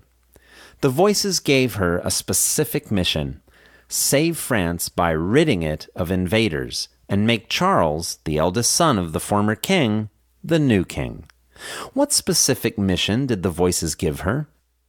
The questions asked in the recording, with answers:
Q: What specific mission did the voices give her?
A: The voices gave her a specific mission: save France by ridding it of invaders and make Charles, the eldest son of the former king, the new king.